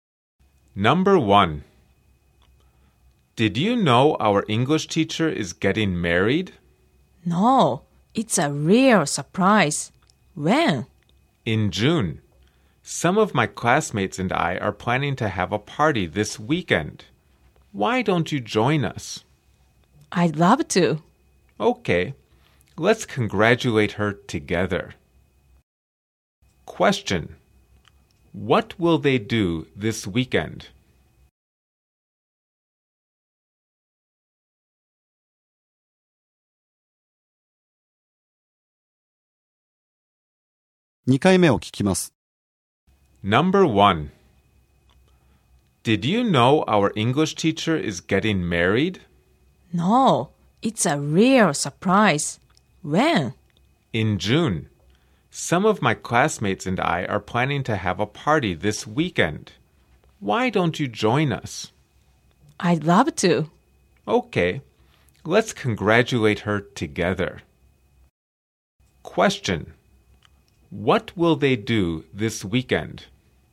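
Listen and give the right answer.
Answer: Have a party for their English teacher, who is getting married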